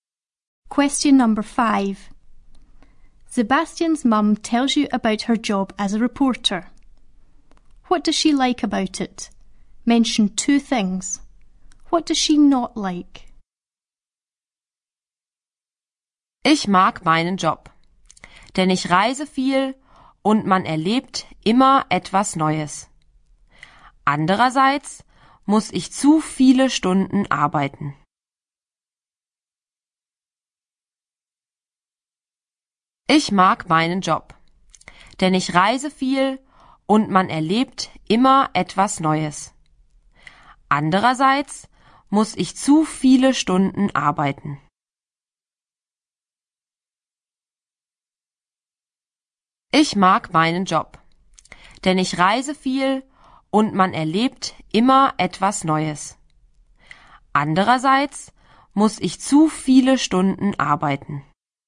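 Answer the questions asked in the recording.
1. She travels a lot; she always experiences something new
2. She has to work too many hours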